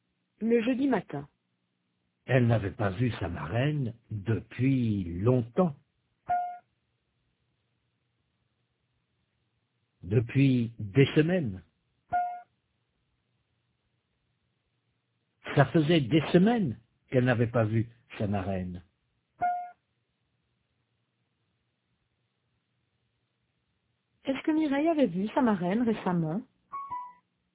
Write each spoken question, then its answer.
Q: Est-ce que Mireille avait vu sa marraine récemment?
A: Non, ça faisait des semaines qu'elle ne l'avait pas vue.